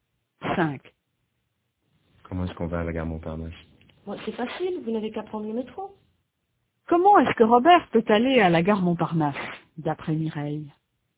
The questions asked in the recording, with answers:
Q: Comment est-ce que Robert peut aller à la gare Montparnasse, d'après Mireille?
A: En métro.